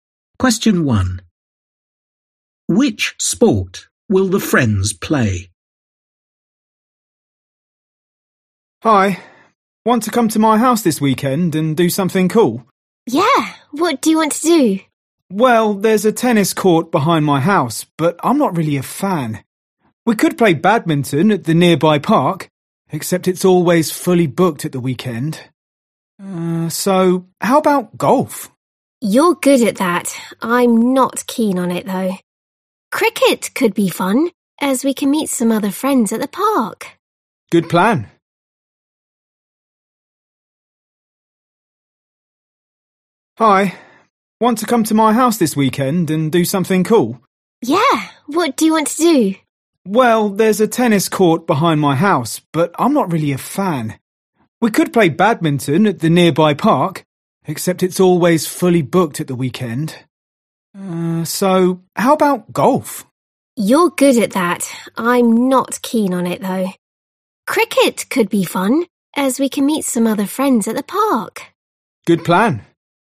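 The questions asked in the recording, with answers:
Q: Which sport will the friends play?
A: cricket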